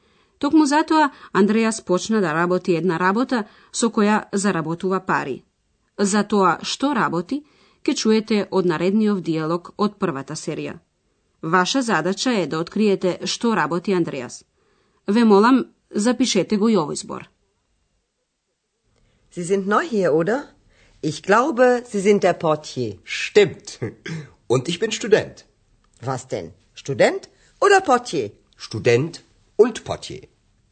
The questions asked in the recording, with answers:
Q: Ваша задача е да откриете што работи Андреас.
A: Тој своите пари ги заработува како «портије».